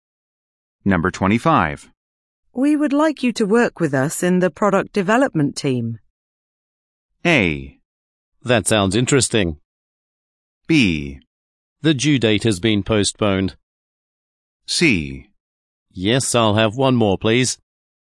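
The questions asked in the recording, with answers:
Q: We would like you to work with us in the product development team.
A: A: That sounds interesting.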